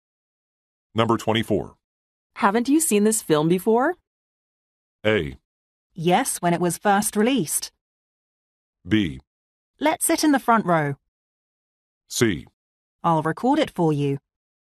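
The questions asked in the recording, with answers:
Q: Haven't you seen this film before?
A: A: Yes, when it was first released.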